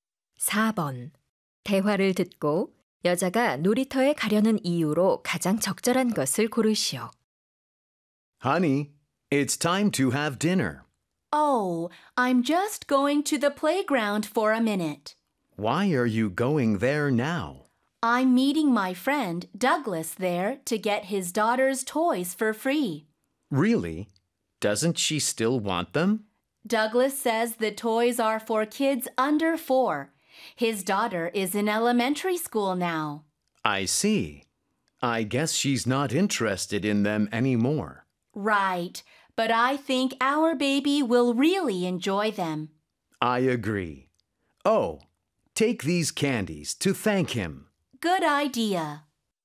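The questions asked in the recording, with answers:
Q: 대화를 듣고 여자가 놀이터에 가려는 이유로 가장 적절한 것을 고르시오.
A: 친구 Douglas에게서 그의 딸의 장난감을 무료로 받기 위해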